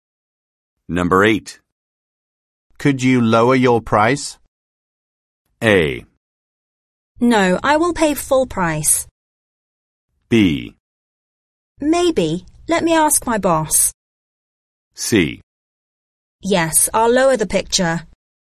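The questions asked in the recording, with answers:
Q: Could you lower your price?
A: B: Maybe. Let me ask my boss.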